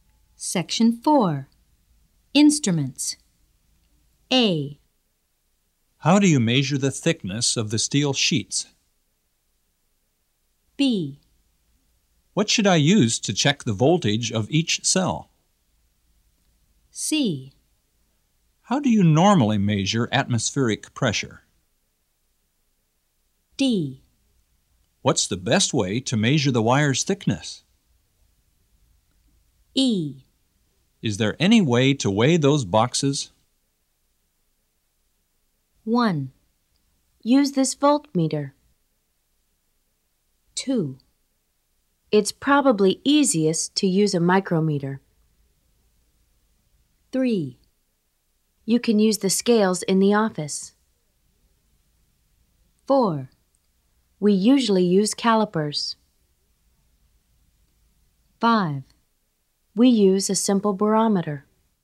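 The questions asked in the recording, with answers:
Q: What should I use to check the voltage of each cell?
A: 1: Use this voltmeter.

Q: How do you normally measure atmospheric pressure?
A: 5: We use a simple barometer.

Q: Is there any way to weigh those boxes?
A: 3: You can use the scales in the office.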